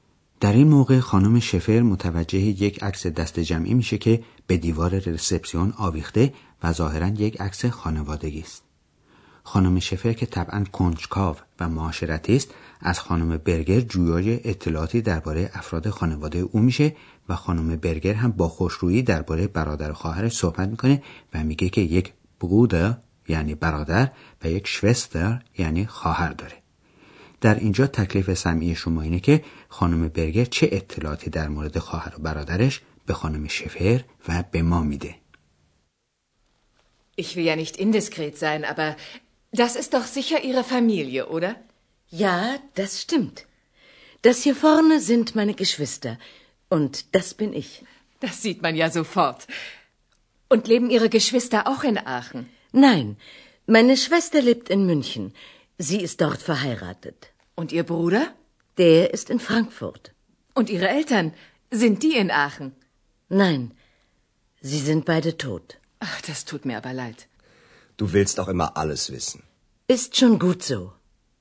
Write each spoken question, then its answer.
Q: در اینجا تکلیف سمعی شما اینه که خانم برگر چه اطلاعاتی در مورد خواهر و برادرش به خانم شفر و به ما میده.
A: از حرفهای خانم برگر متوجه شدید که خواهرش ازدواج کرده و در شهر مونیخ زندگی میکنه؟ حتما متوجه شدید.